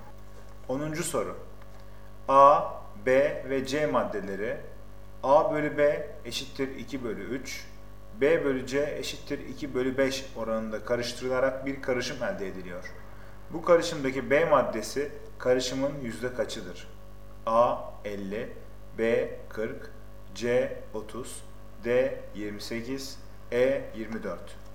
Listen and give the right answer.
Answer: Doğru cevap E 24.